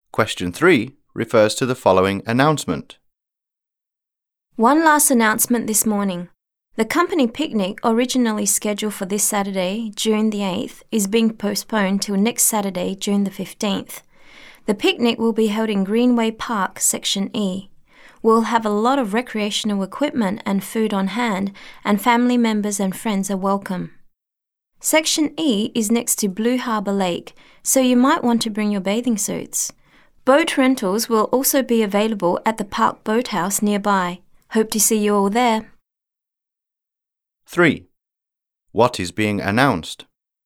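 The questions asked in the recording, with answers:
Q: What is being announced?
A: The company picnic is postponed from June 8th to Saturday, June 15th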